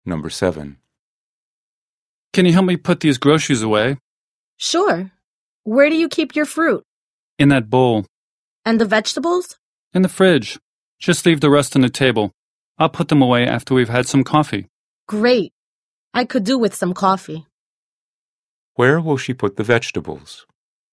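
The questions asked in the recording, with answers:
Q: Where will she put the vegetables?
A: In the fridge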